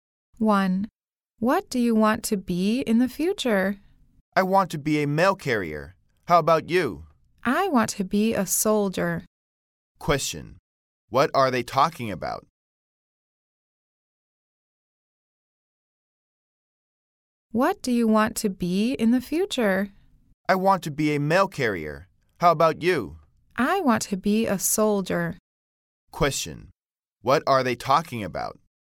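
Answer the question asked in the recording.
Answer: What they want to be in the future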